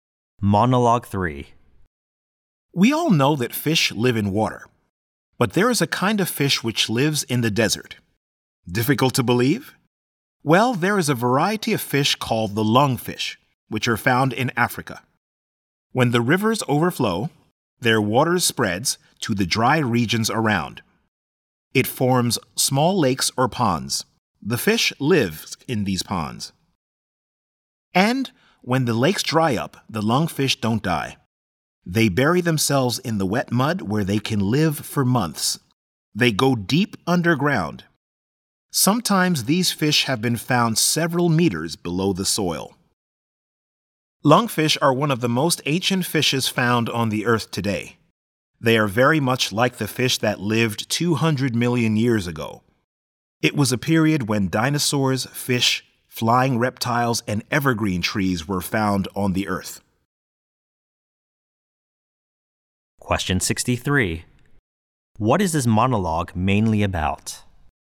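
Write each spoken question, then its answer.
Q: What is this monologue mainly about?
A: The lungfish, a fish that can survive in the desert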